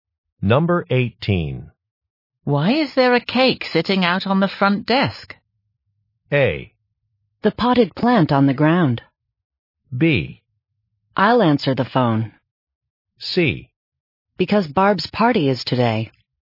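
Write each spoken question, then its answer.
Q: Why is there a cake sitting out on the front desk?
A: C: Because Barb's party is today.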